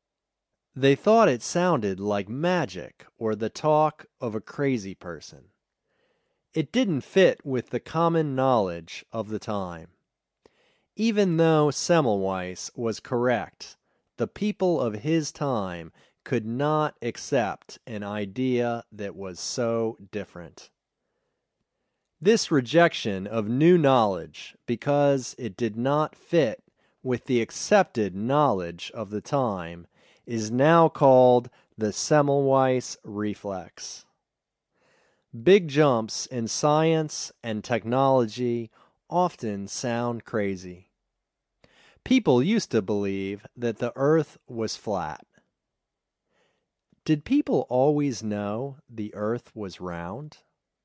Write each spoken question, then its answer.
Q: Did people always know the Earth was round?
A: No, people didn't always know the Earth was round.